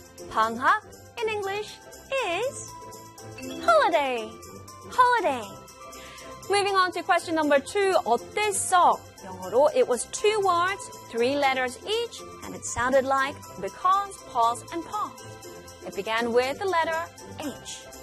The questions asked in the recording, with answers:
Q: 어땠어? 영어로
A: 어땠어? In English is how was.